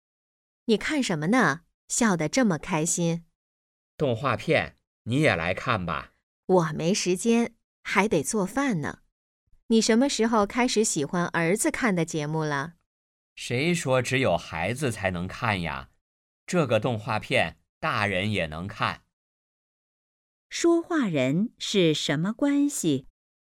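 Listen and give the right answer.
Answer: 夫妻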